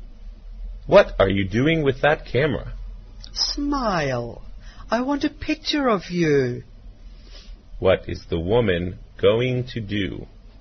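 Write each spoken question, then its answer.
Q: What is the woman going to do?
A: Take a picture.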